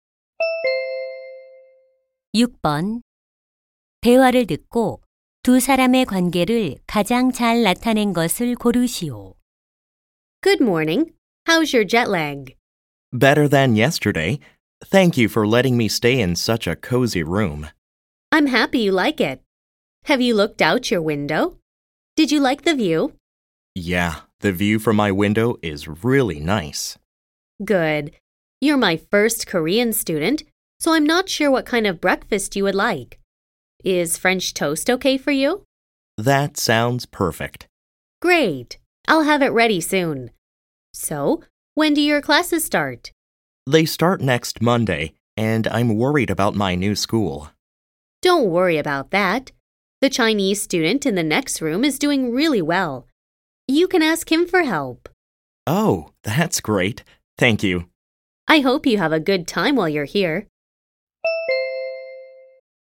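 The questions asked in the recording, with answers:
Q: 대화를듣고두사람의관계를가장잘나타낸것을고르시오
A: 홈스테이 호스트 - 유학생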